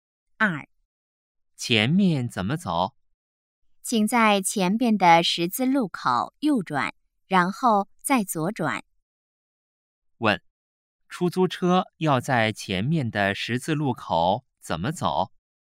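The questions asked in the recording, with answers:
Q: 问,出租车要在前面的十字路口怎么走?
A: 右转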